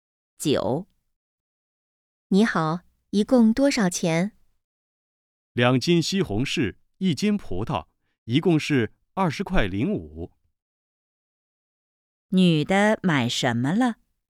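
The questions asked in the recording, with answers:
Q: 女的买什么了?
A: 西红柿和葡萄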